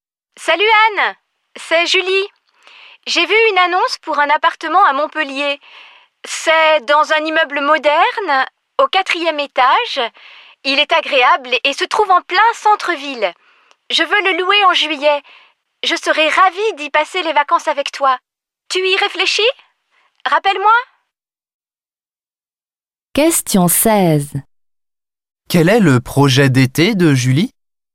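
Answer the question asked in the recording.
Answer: Louer un appartement à Montpellier en juillet pour passer les vacances avec Anne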